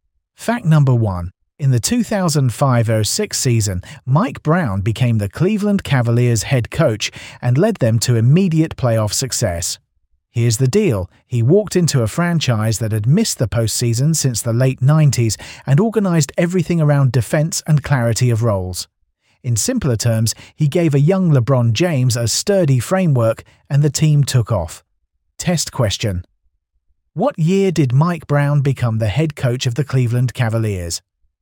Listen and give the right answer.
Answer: The 2005-06 season.